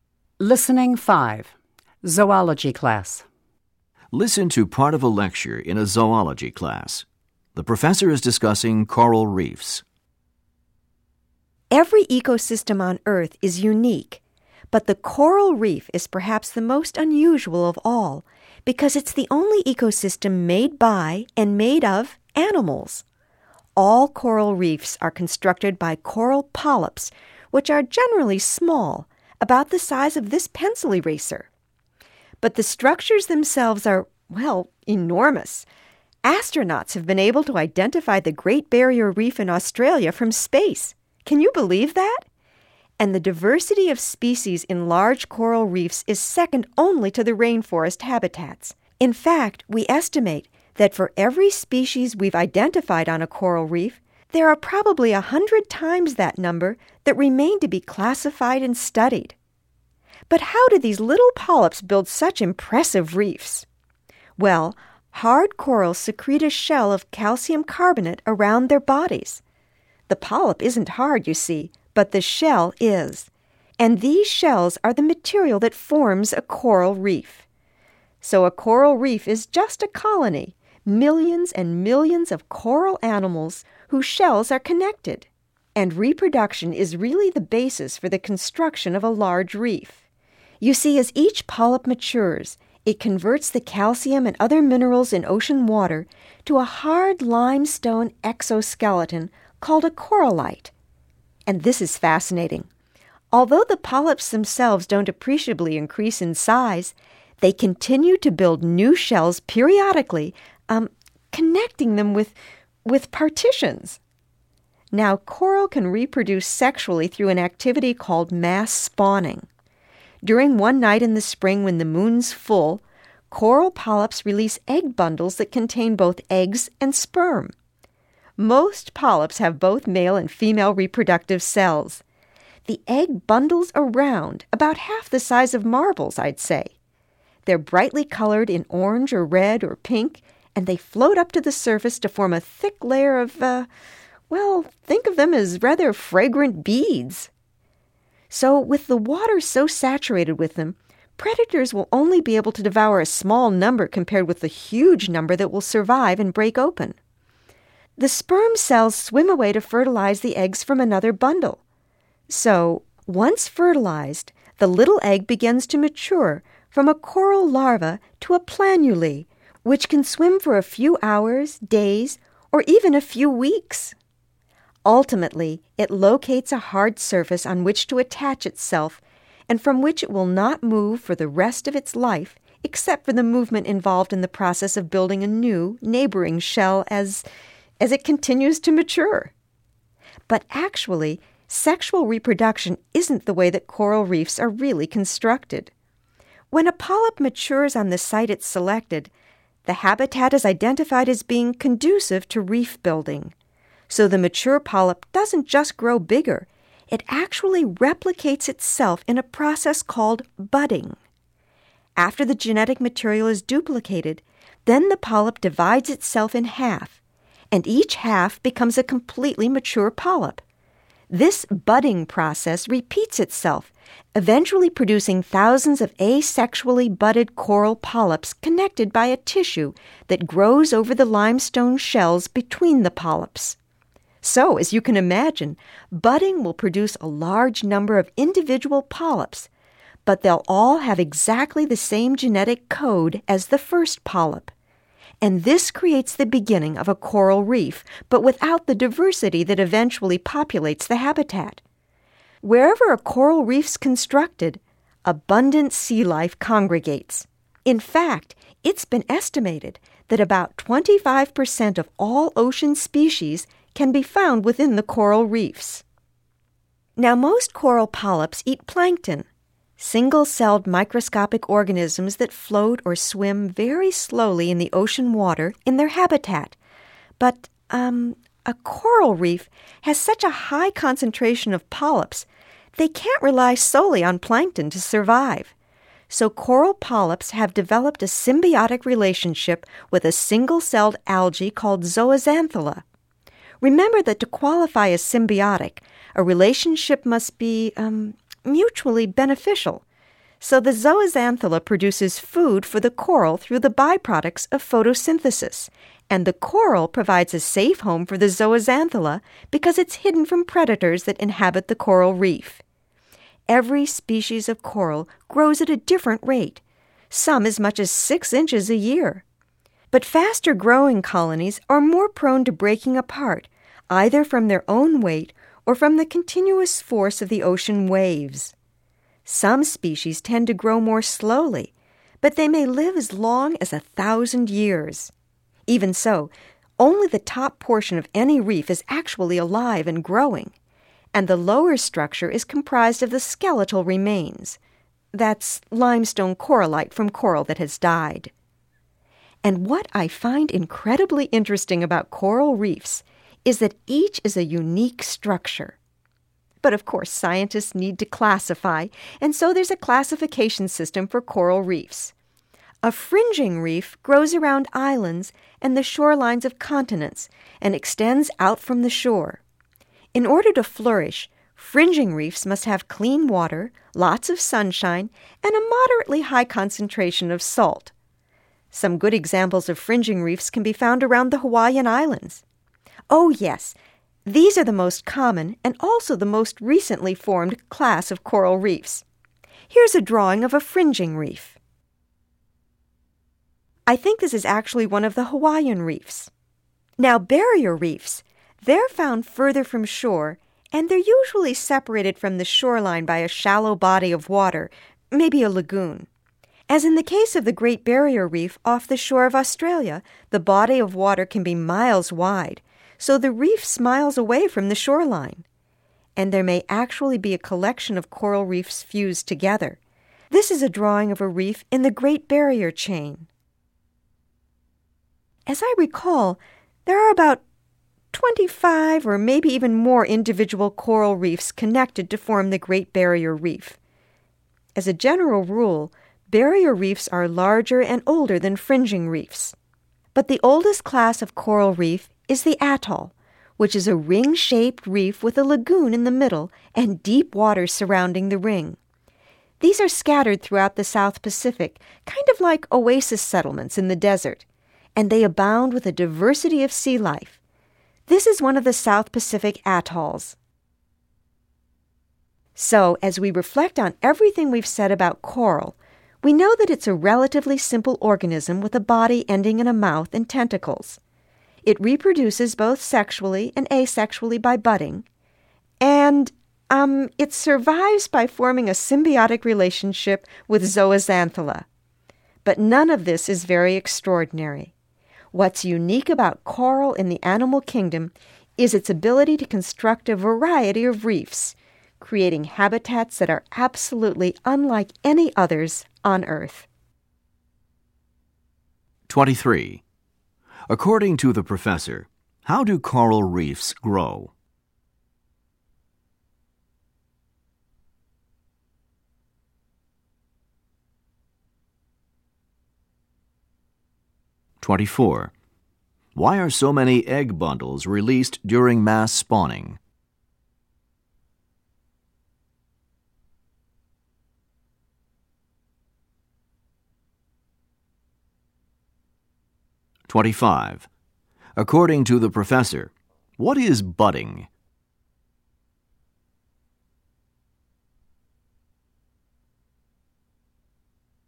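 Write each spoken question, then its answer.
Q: According to the professor, how do coral reefs grow?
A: Coral polyps keep building new limestone shells that connect to the old ones, mostly by budding.

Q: Why are so many egg bundles released during mass spawning?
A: Predators can eat only a small share, so most of them survive.

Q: According to the professor, what is budding?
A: Asexual reproduction in which a polyp splits in half into two identical polyps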